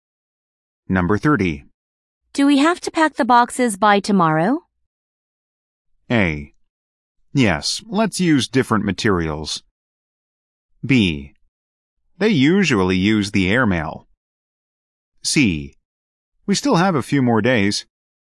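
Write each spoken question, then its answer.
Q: Do we have to pack the boxes by tomorrow?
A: C: We still have a few more days.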